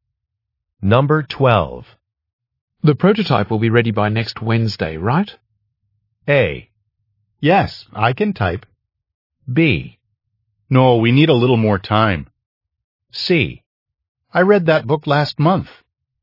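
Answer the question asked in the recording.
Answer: B: No, we need a little more time.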